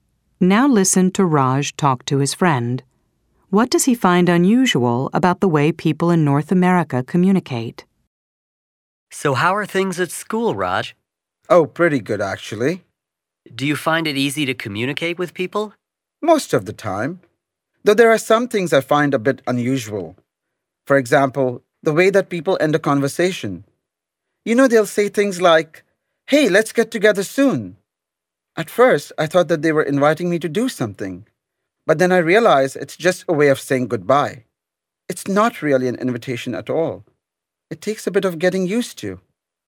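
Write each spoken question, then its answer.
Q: What does he find unusual about the way people in North America communicate?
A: The way people end a conversation: saying "let's get together soon" is just a way of saying goodbye, not a real invitation.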